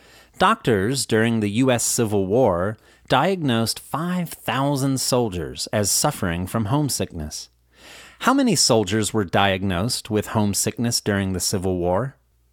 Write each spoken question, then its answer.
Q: How many soldiers were diagnosed with homesickness during the Civil War?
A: 5,000 soldiers were diagnosed with homesickness during the Civil War